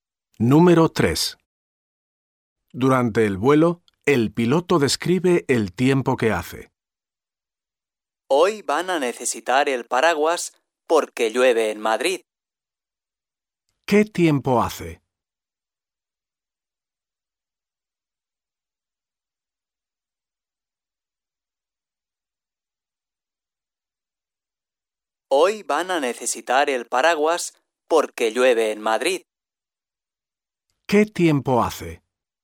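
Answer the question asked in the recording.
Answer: Llueve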